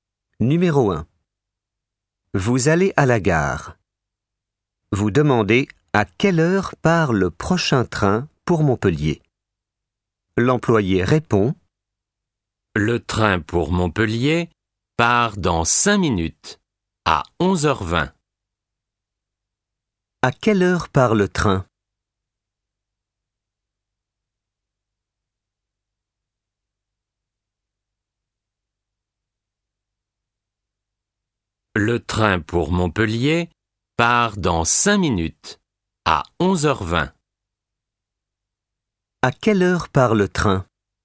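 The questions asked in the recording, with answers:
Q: À quelle heure part le train ?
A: À 11h20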